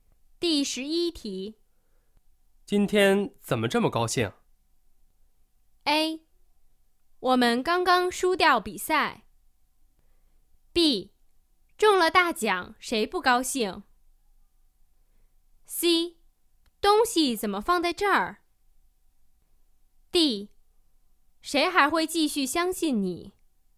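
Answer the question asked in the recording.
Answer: B: 中了大奖,谁不高兴?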